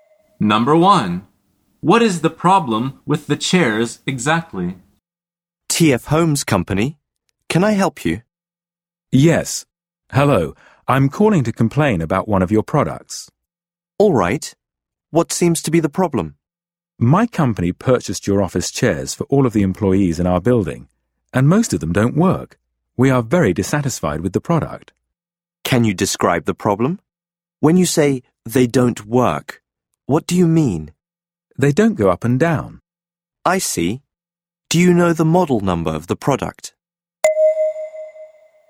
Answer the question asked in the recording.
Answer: The answer is they don't go up and down.